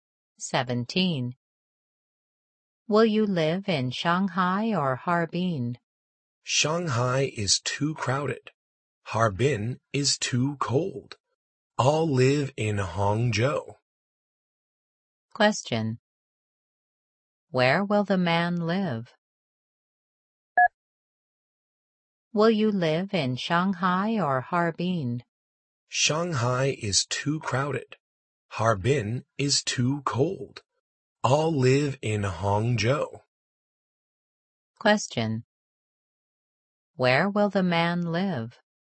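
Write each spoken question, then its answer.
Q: Where will the man live?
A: In Hangzhou.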